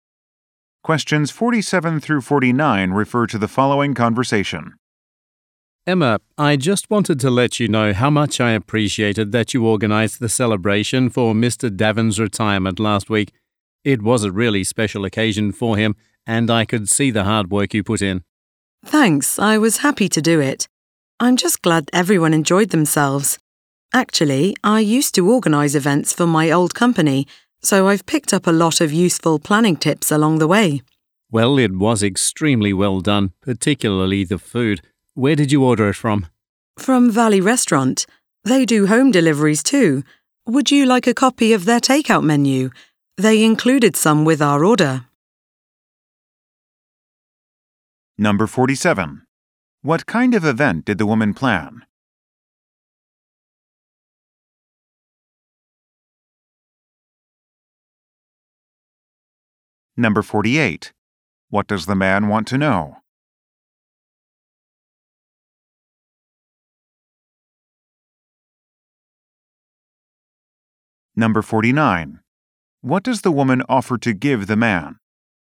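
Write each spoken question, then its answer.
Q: What kind of event did the woman plan?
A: A retirement celebration

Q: What does the man want to know?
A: Where the food was ordered from

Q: What does the woman offer to give the man?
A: A takeout menu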